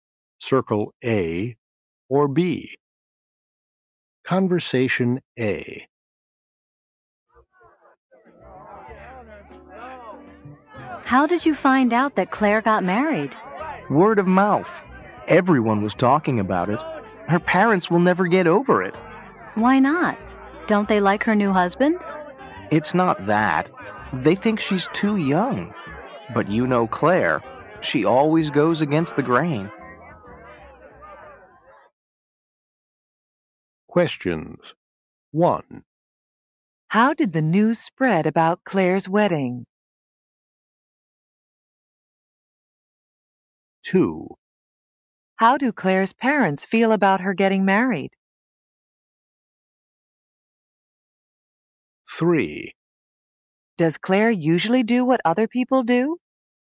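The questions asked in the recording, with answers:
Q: How did the news spread about Claire's wedding?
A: By word of mouth; everyone was talking about it.

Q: How do Claire's parents feel about her getting married?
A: They will never get over it; they think she's too young.

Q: Does Claire usually do what other people do?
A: No, she always goes against the grain.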